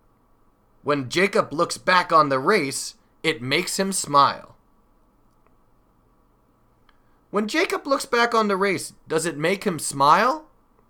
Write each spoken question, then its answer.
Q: When Jacob looks back on the race, does it make him smile?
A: Yes, it does. When he looks back on the race, it makes him smile.